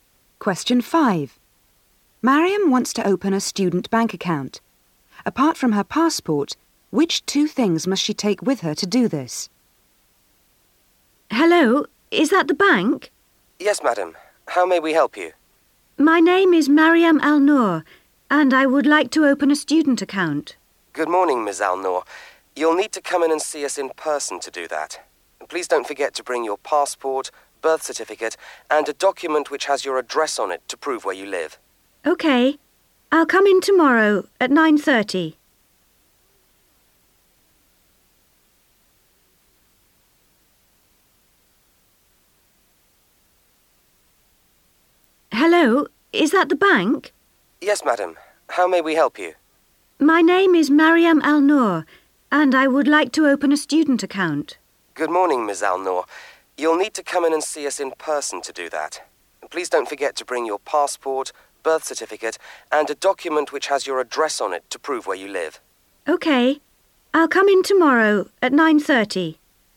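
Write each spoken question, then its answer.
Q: Apart from her passport, which two things must she take with her to do this?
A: Her birth certificate and a document showing her address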